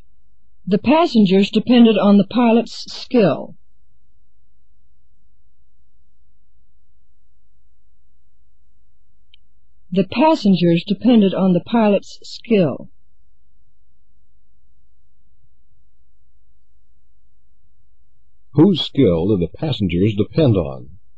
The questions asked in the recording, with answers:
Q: Whose skill did the passengers depend on?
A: The pilot's. They depended on the pilot's skill.